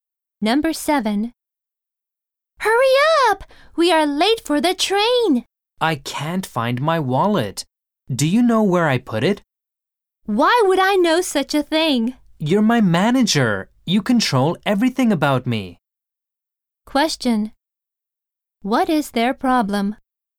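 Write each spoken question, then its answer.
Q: What is their problem?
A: They are late for the train and can't find his wallet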